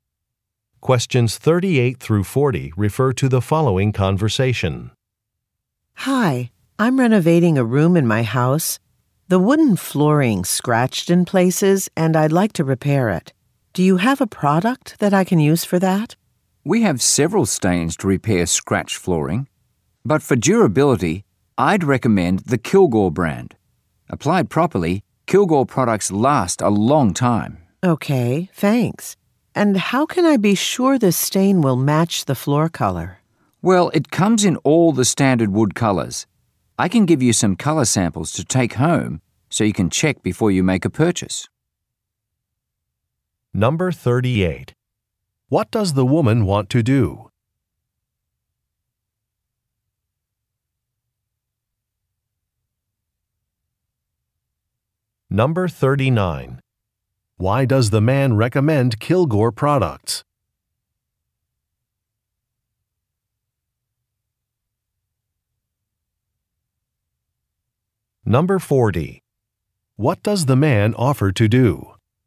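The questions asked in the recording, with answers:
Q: What does the woman want to do?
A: Repair her scratched wooden floor

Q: Why does the man recommend Kilgore products?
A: They are durable

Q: What does the man offer to do?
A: Give her color samples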